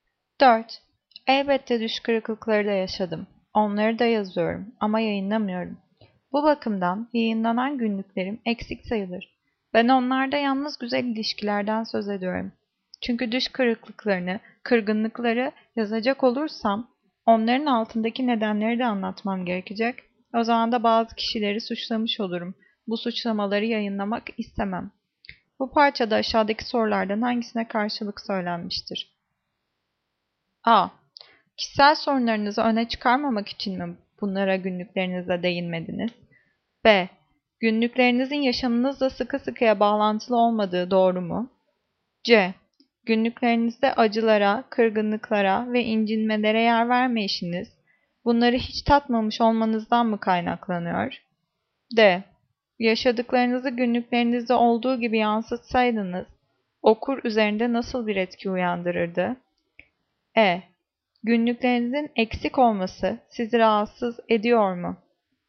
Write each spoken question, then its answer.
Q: Bu parçada aşağıdaki sorulardan hangisine karşılık söylenmiştir?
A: Cevap C. Günlüklerinizde acılara, kırgınlıklara ve incinmelere yer vermeyişiniz, bunları hiç tatmamış olmanızdan mı kaynaklanıyor?